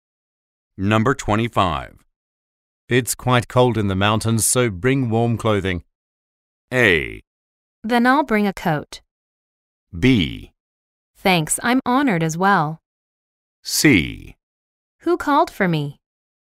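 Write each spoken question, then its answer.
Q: It's quite cold in the mountains, so bring warm clothing.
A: A: Then I'll bring a coat.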